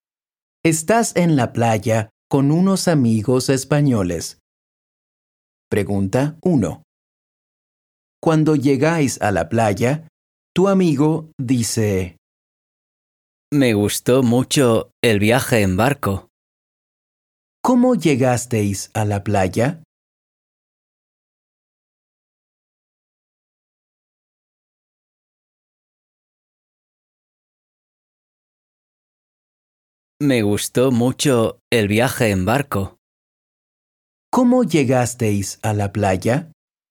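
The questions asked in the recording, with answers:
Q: ¿Cómo llegasteis a la playa?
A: En barco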